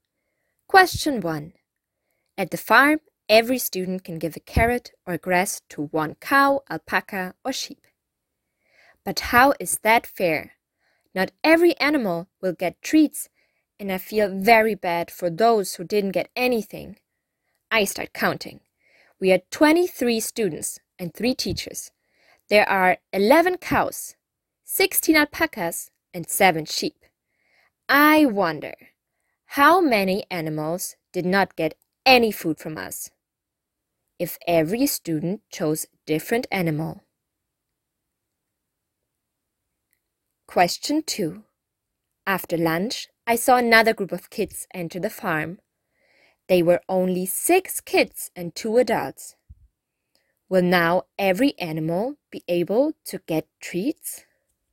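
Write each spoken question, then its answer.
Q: I wonder, how many animals did not get any food from us? If every student chose a different animal.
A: 11 animals (34 animals - 23 students)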